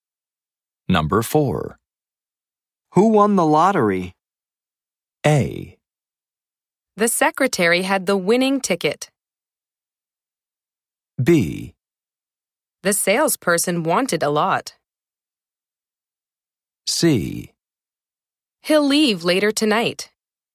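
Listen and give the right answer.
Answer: A: The secretary had the winning ticket.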